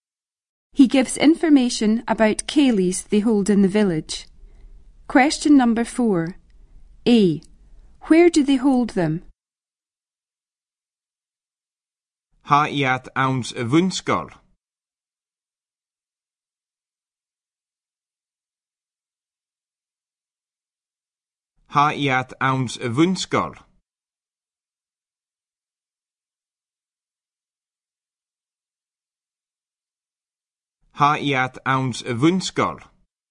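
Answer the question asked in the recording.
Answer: In the primary school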